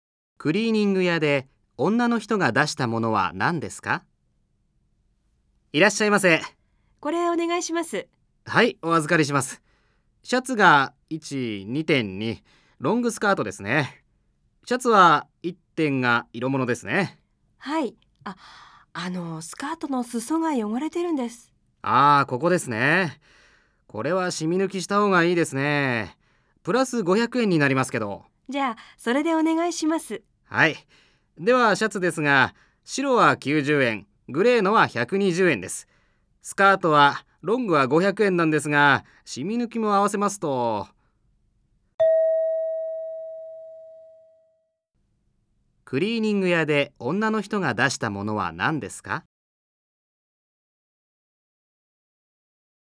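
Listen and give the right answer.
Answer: シャツ2点(白とグレー)とロングスカート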